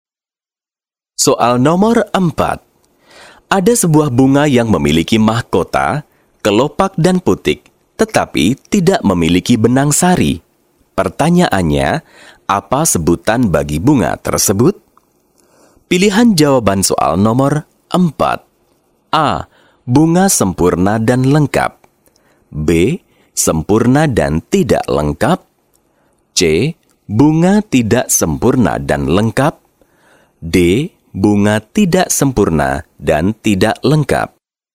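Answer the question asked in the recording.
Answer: D: Bunga tidak sempurna dan tidak lengkap.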